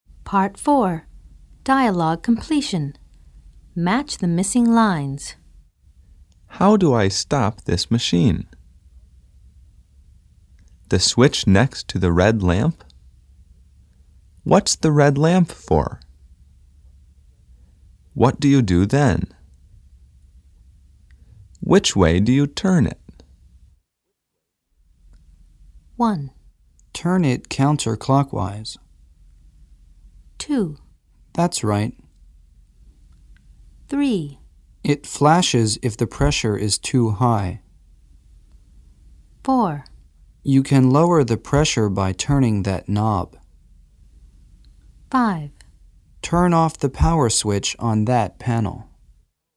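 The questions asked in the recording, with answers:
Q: How do I stop this machine?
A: 5: Turn off the power switch on that panel.

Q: The switch next to the red lamp?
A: 2: That's right.

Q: What's the red lamp for?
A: 3: It flashes if the pressure is too high.

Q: What do you do then?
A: 4: You can lower the pressure by turning that knob.

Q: Which way do you turn it?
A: 1: Turn it counterclockwise.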